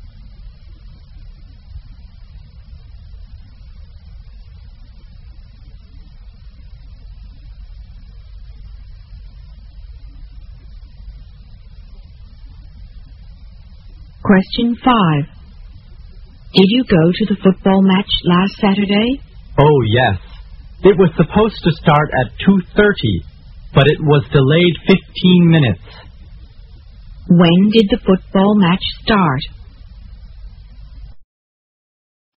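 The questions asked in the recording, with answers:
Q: When did the football match start?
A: At 2:45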